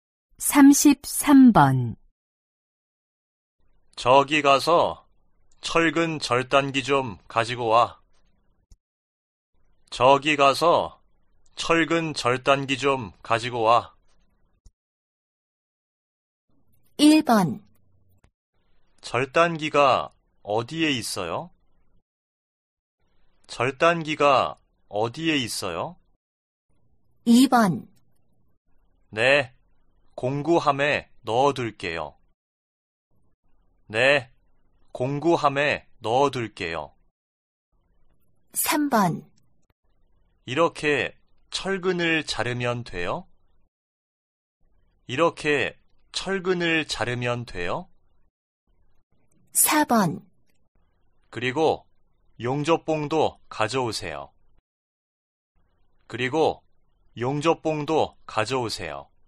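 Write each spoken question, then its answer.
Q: 저기가서철근절단기좀가지고와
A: 1: 절단기가어디에있어요?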